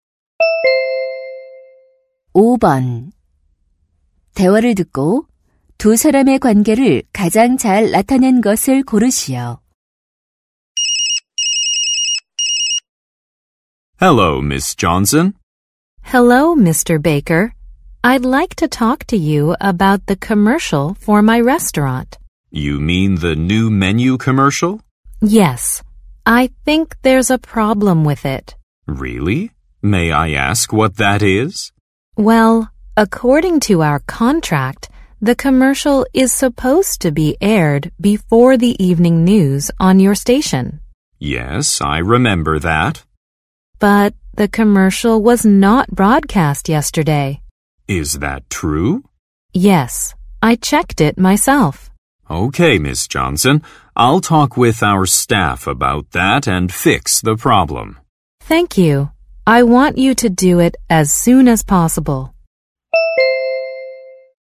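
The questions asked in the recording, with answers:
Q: 대화를 듣고 두 사람의 관계를 가장 잘 나타낸 것을 고르시오.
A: 식당 주인 - 방송국 광고 담당자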